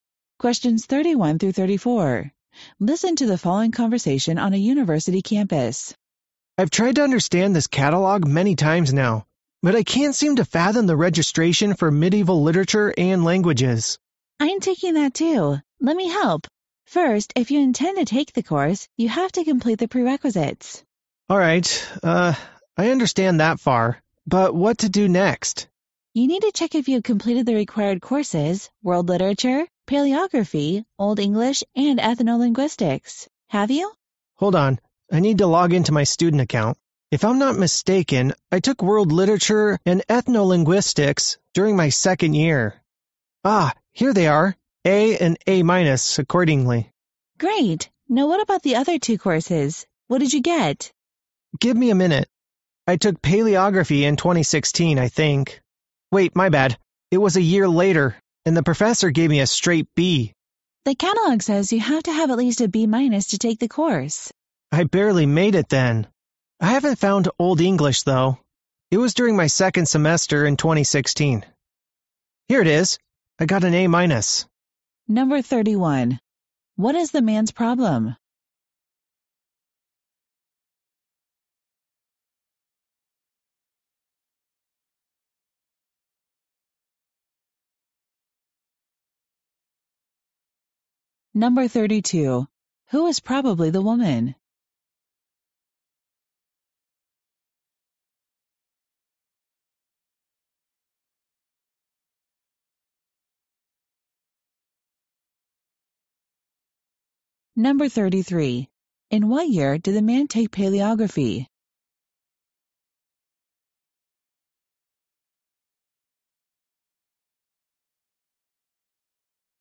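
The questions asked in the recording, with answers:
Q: What is the man's problem?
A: He can't understand how to register for the medieval literature and languages course

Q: Who is probably the woman?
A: A fellow student taking the same course

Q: In what year did the man take paleography?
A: 2017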